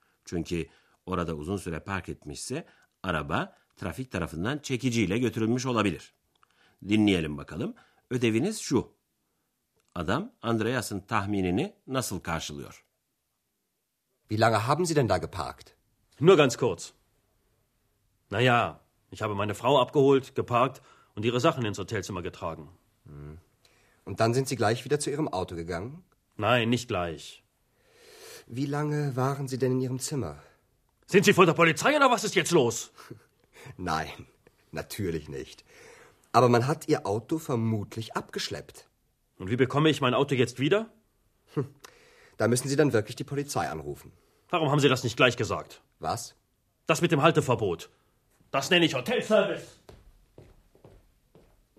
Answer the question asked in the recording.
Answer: Müşteri, arabasının çekilmiş olmasının hırsını neredeyse Andreas'tan çıkaracaktı.